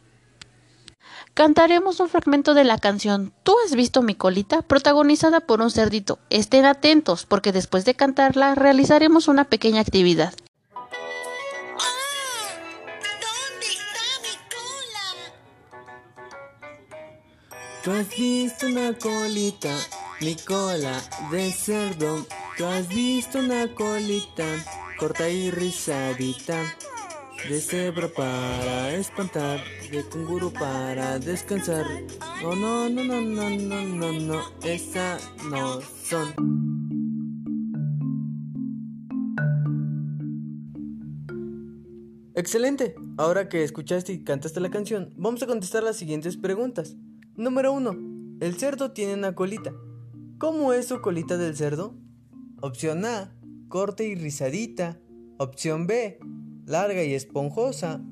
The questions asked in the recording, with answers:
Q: ¿Cómo es su colita del cerdo?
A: Correcto. La respuesta correcta es A, Corte y rizadita.